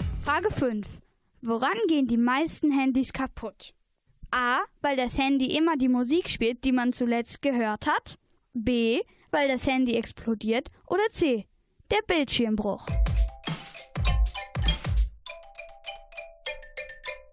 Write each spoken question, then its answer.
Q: Woran gehen die meisten Handys kaputt?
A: Antwort C ist richtig. Der Bildschirmbruch.